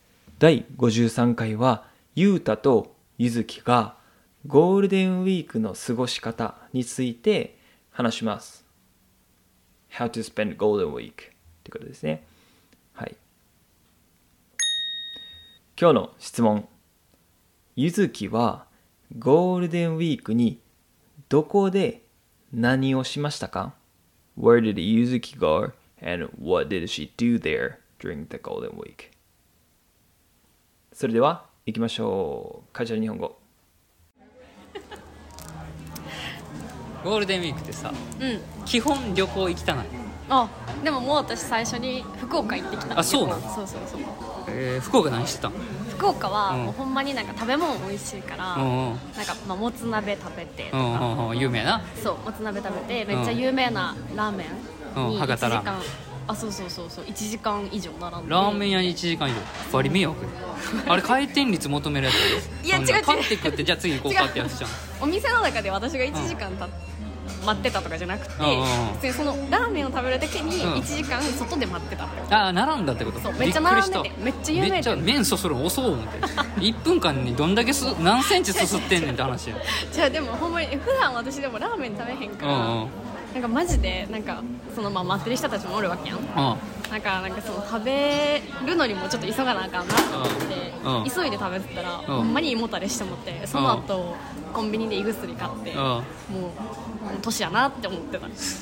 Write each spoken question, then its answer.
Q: ゆずきはゴールデンウィークにどこで何をしましたか?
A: ゆずきは福岡に行き、ラーメンやもつ鍋を食べました。